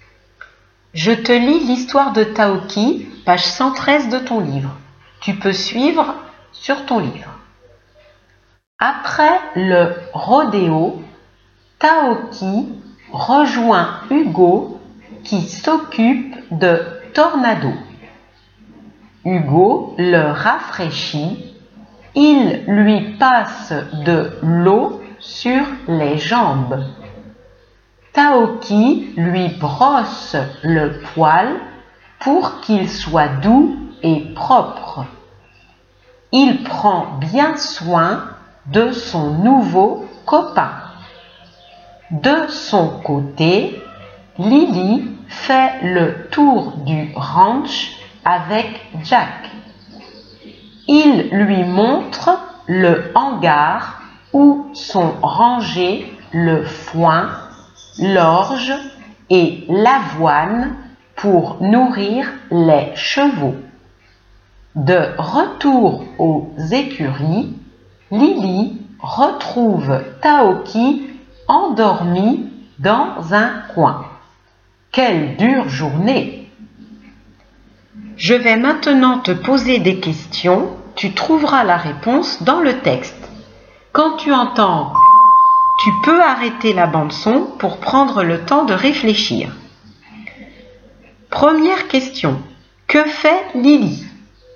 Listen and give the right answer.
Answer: Lily fait le tour du ranch avec Jack.